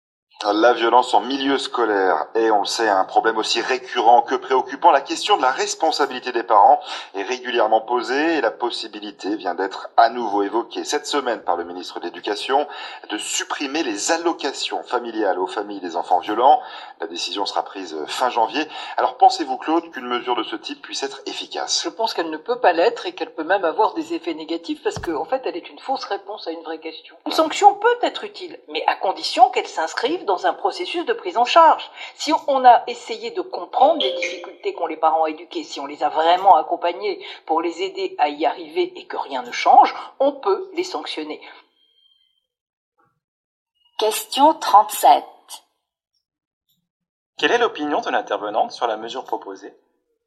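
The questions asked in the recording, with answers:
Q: Quelle est l'opinion de l'intervenante sur la mesure proposée ?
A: Elle la juge inefficace, voire négative sans accompagnement des parents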